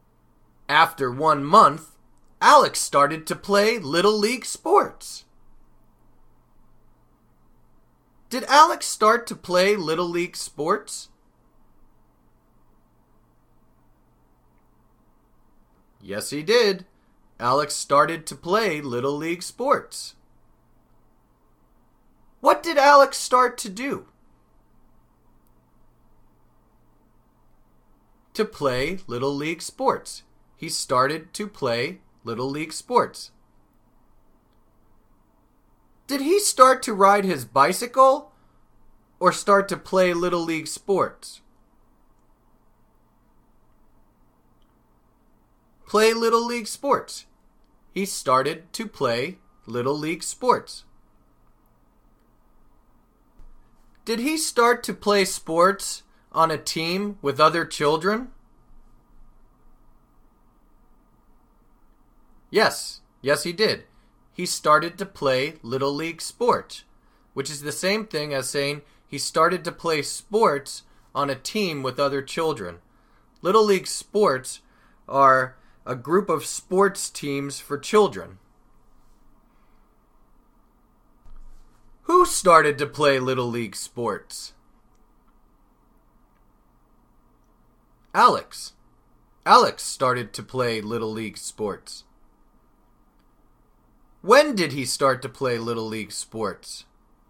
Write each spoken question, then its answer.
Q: When did he start to play Little League sports?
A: After 1 month. After 1 month, Alex started to play Little League sports.